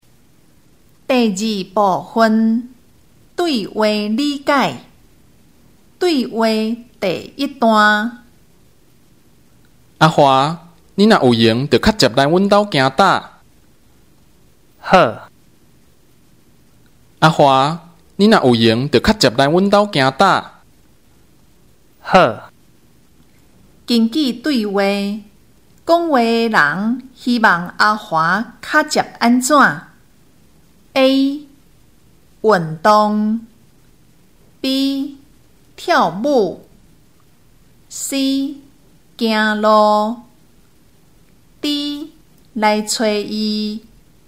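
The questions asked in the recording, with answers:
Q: 根据对话,讲话的人希望阿华较接安怎?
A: D: 来找他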